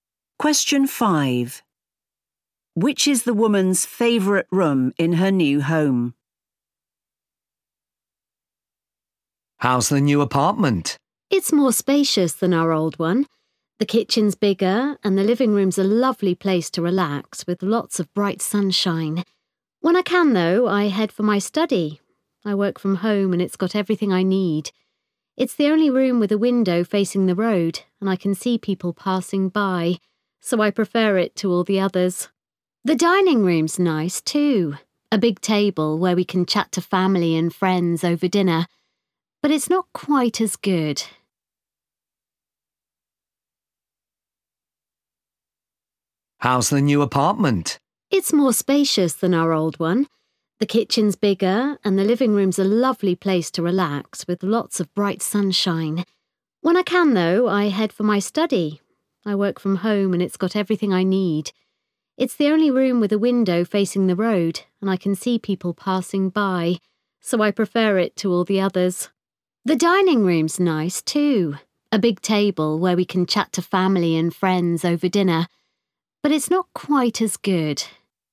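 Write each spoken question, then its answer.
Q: Which is the woman's favorite room in her new home?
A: her study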